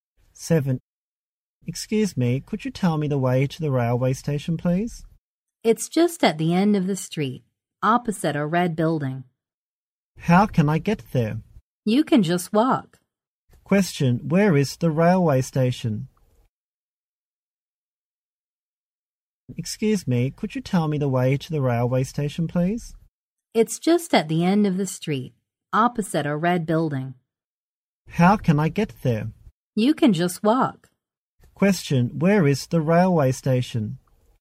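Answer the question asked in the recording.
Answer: At the end of the street, opposite a red building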